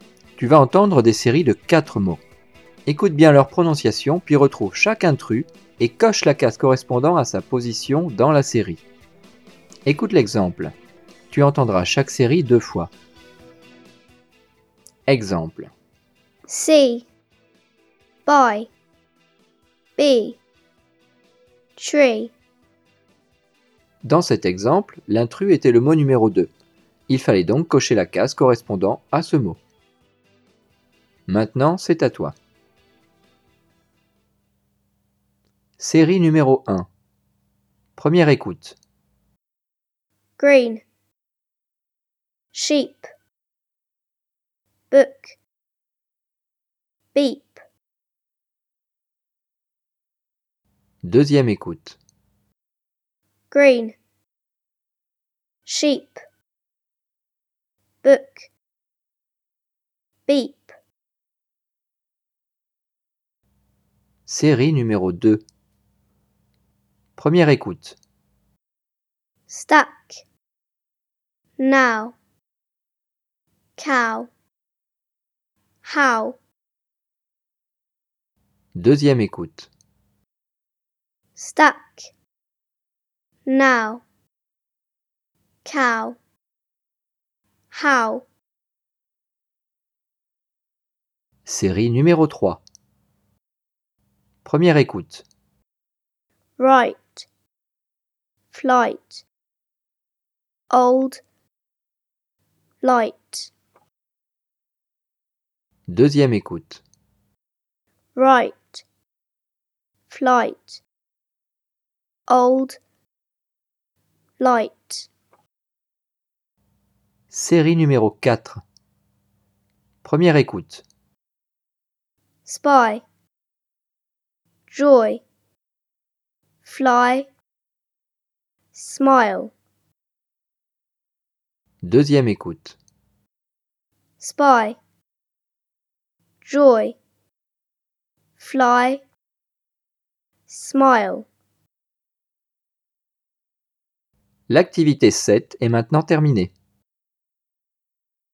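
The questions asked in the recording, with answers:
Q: Série numéro 1.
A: 3: Book

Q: Série numéro 2.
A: 1: Stack

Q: Série numéro 3.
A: 3: Old

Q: Série numéro 4.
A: 2: Joy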